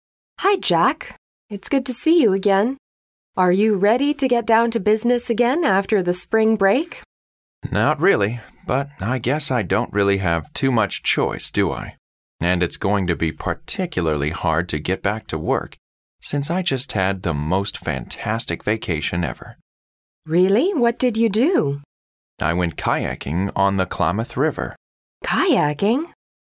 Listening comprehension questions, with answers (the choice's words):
What are the speakers discussing?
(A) A trip to visit the Eskimos.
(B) A trip the man has just taken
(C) A camping trip they took.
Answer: A trip the man has just taken

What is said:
W: Hi, Jack. It's good to see you again. Are you ready to get down to business again after the spring break?
M: Not really, but I guess I don't really have too much choice, do I? And it's going to be particularly hard to get back to work since I just had the most fantastic vacation ever.
W: Really? What did you do?
M: I went kayaking on the Klamath River.
W: Kayaking?